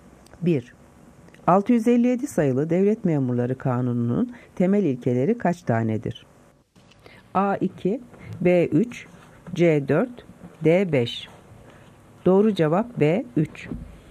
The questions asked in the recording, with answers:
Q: 657 sayılı Devlet Memurları Kanunu'nun temel ilkeleri kaç tanedir?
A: Doğru cevap B3.